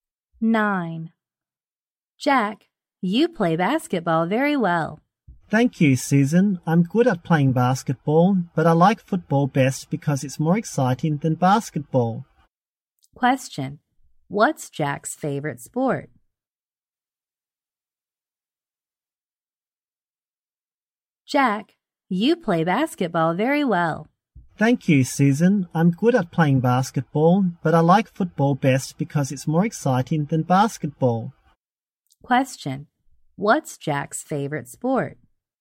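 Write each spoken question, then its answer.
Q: Question, what's Jack's favorite sport?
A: Football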